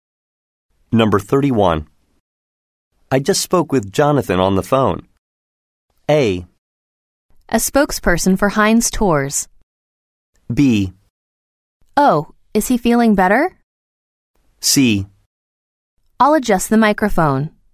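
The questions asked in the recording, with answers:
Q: I just spoke with Jonathan on the phone.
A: B: Oh, is he feeling better?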